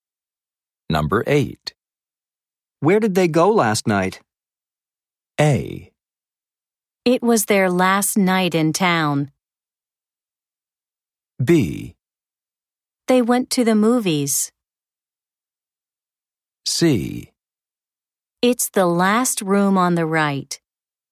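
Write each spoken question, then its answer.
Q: Where did they go last night?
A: B: They went to the movies.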